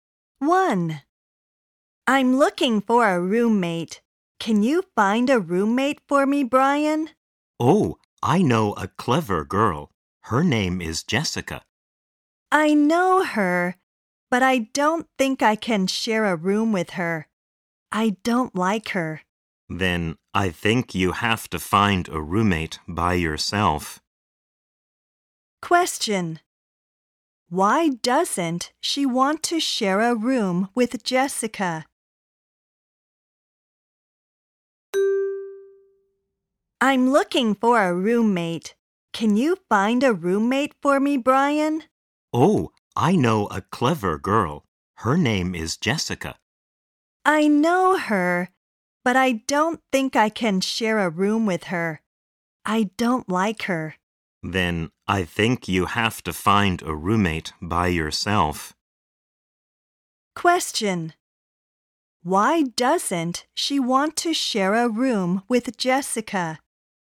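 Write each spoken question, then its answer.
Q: Why doesn't she want to share a room with Jessica?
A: Because she doesn't like her.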